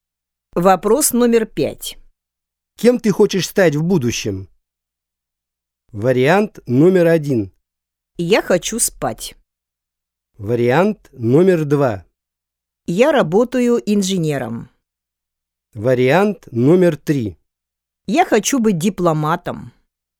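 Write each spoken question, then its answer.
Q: Кем ты хочешь стать в будущем?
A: 3: Я хочу быть дипломатом.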